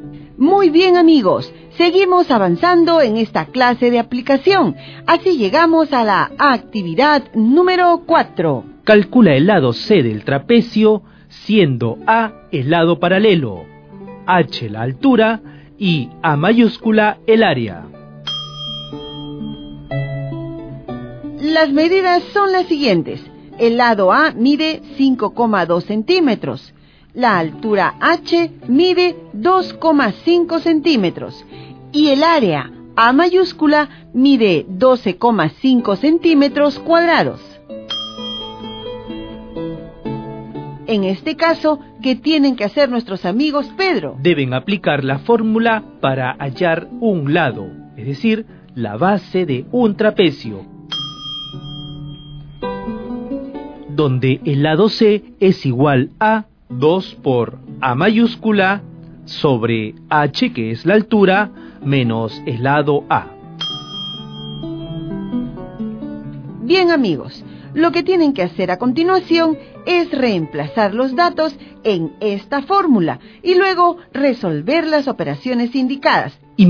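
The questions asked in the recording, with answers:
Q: Calcula el lado C del trapecio, siendo A el lado paralelo, H la altura y A mayúscula el área.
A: 4,8 cm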